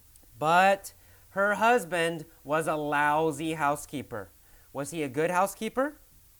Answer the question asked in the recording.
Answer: No. He was a very bad housekeeper.